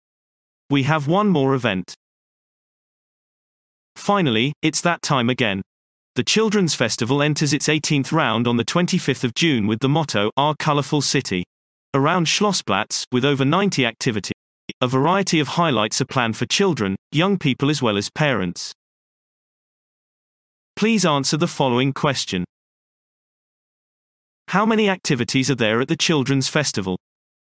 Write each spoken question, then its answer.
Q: How many activities are there at the Children's Festival?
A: There are over 90 activities at the Children's Festival.